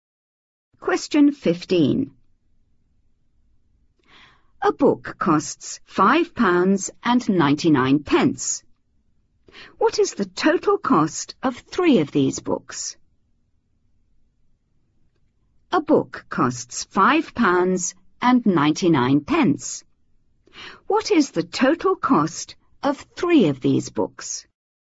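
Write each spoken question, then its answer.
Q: £5.99. What is the total cost of three of these books?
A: £17.97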